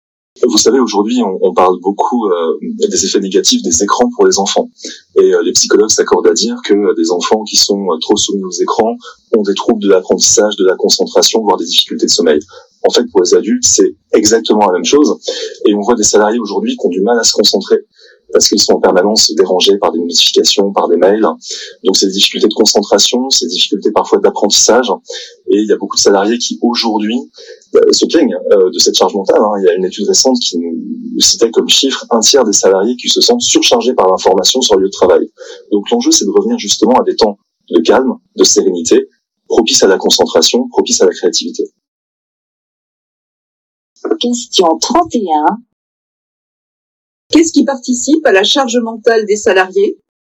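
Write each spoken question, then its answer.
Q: Qu'est-ce qui participe à la charge mentale des salariés ?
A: Les notifications et les mails qui les dérangent en permanence (surcharge d'information)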